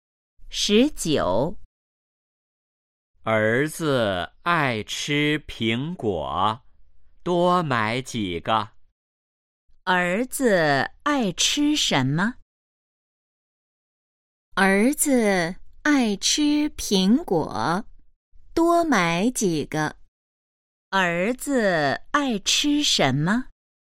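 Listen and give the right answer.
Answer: 苹果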